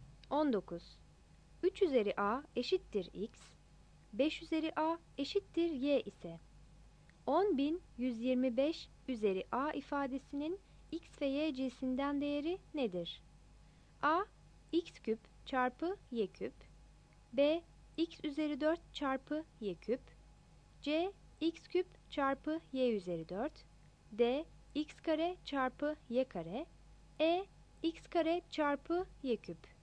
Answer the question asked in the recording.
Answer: 19 B